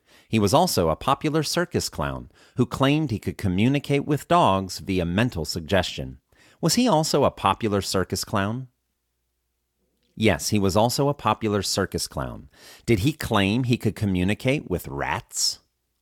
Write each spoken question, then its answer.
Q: Did he claim he could communicate with rats?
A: No, he didn't claim he could communicate with rats.